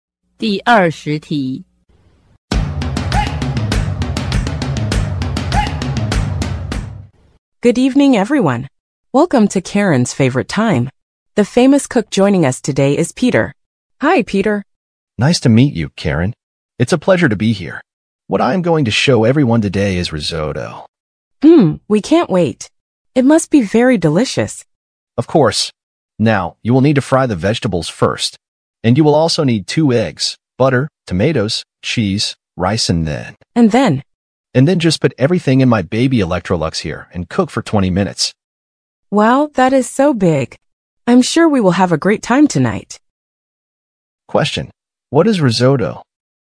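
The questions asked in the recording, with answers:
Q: what is risotto?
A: A rice dish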